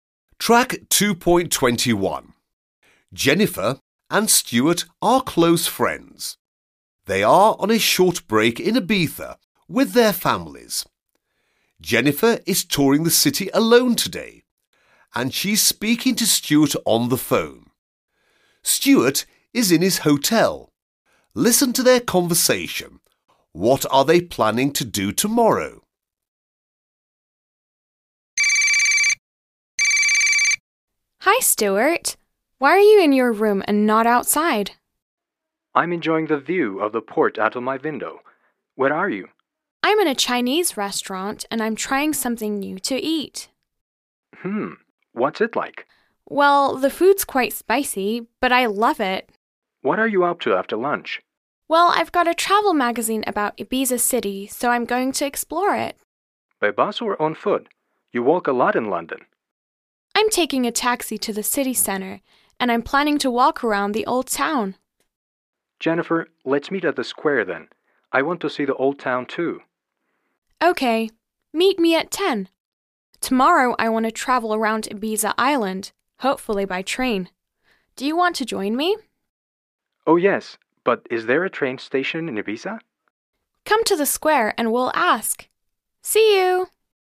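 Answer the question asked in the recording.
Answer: Travel around Ibiza Island, hopefully by train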